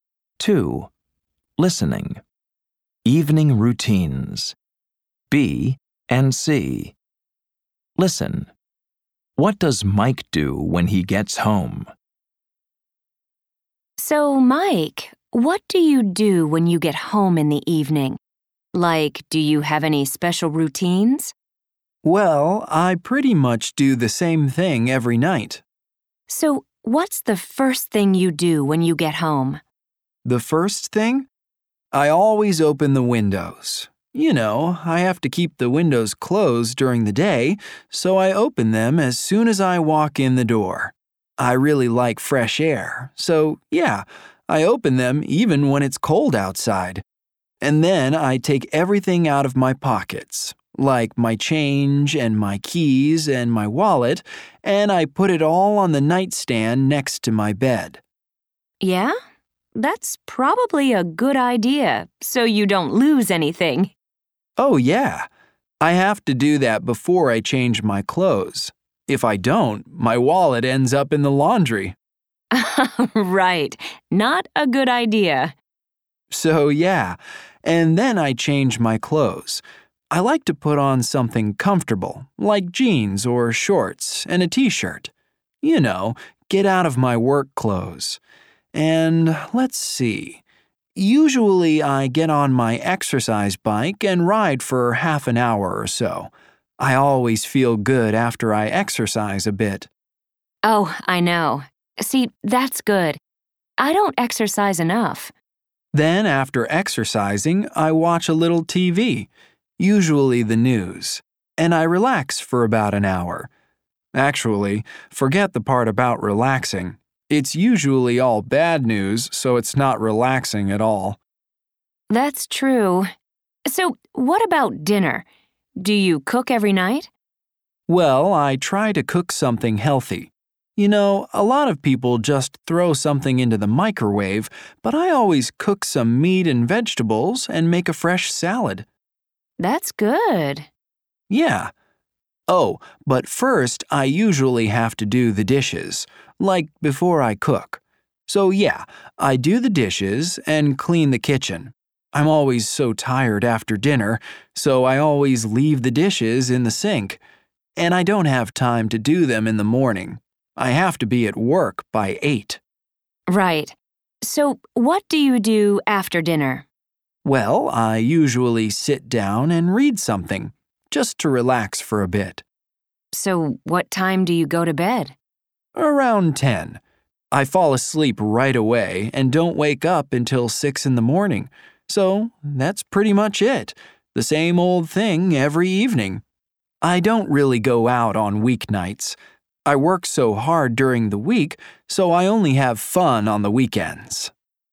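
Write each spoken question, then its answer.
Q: What does Mike do when he gets home?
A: He opens the windows, empties his pockets, changes clothes, rides his exercise bike, watches TV, does the dishes, cooks dinner, reads, and goes to bed around 10.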